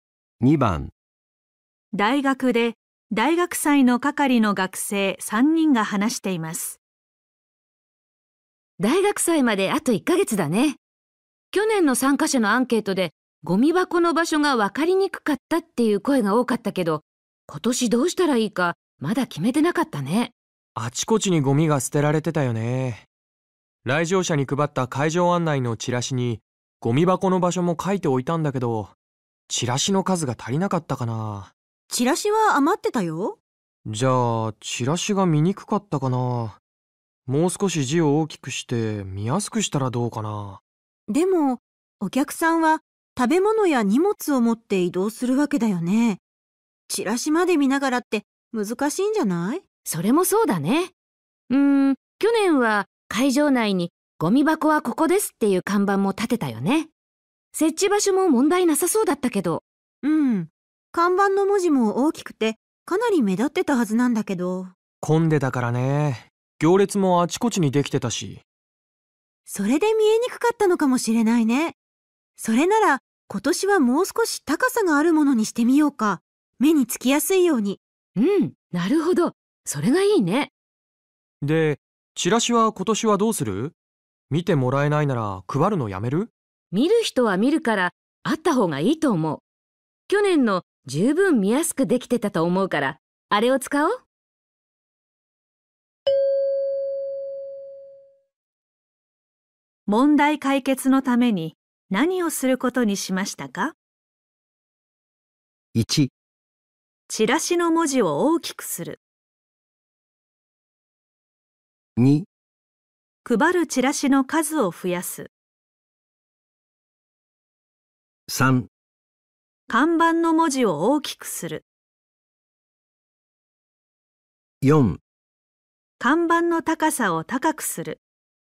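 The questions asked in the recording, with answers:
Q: 問題解決のために何をすることにしましたか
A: 4: 看板の高さを高くする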